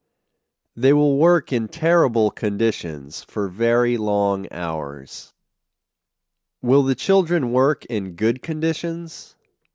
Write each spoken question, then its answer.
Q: Will the children work in good conditions?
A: No, they won't work in good conditions.